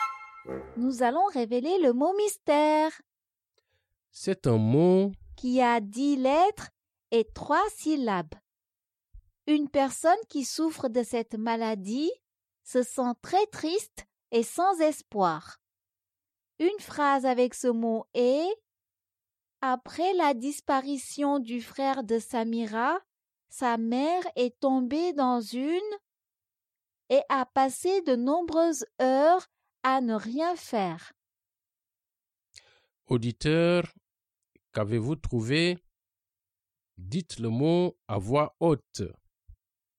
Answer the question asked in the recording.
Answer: Le mot mystère est dépression.